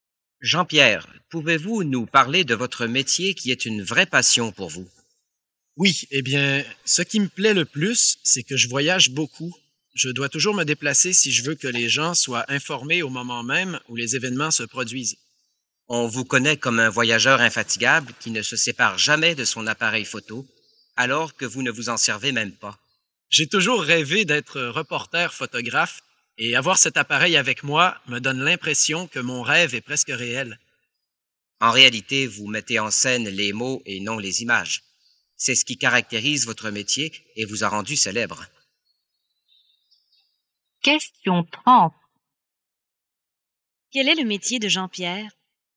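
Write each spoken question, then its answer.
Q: Quel est le métier de Jean-Pierre?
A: Journaliste (reporter qui écrit)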